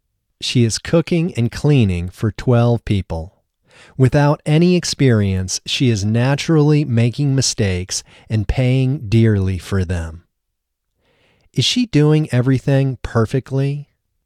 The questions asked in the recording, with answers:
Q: Is she doing everything perfectly?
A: No, she isn't doing everything perfectly.